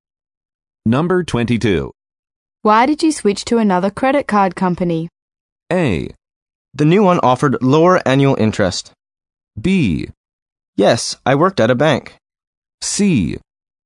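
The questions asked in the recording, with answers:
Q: Why did you switch to another credit card company?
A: A: The new one offered lower annual interest.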